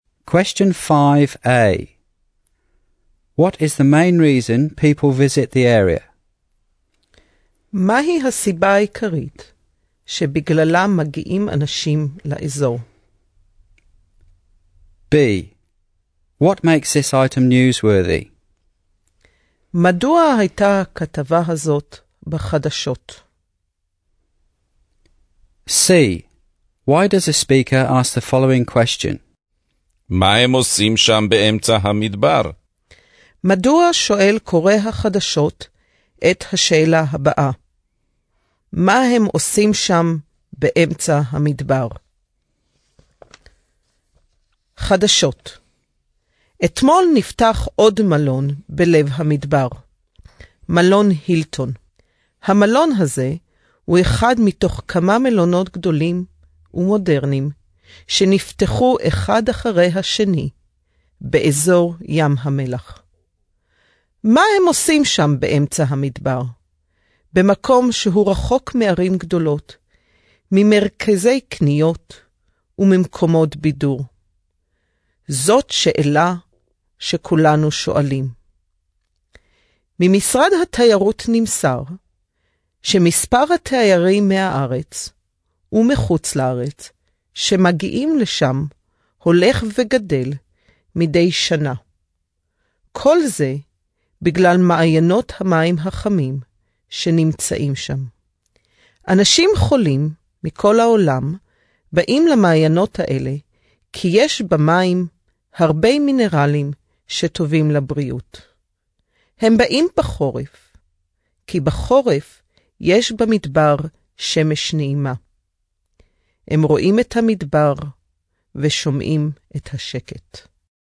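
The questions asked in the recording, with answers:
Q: What is the main reason people visit the area?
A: The hot springs, whose mineral-rich water is good for health

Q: What makes this item newsworthy?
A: Another hotel (the Hilton) opened yesterday in the Dead Sea desert area

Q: Why does a speaker ask the following question?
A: Because the place is far from big cities, shopping centres and entertainment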